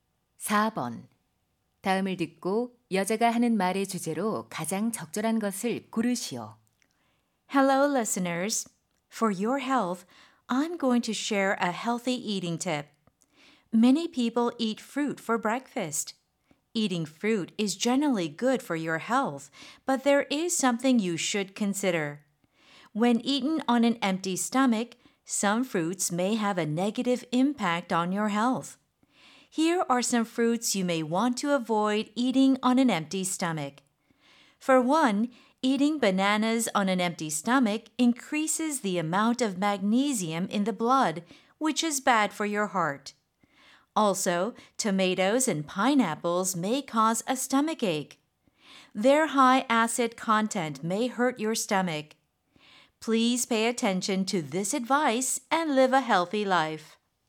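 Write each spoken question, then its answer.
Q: 다음을 듣고 여자가 하는 말의 주제로 가장 적절한 것을 고르시오.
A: 공복에 먹으면 안 좋은 과일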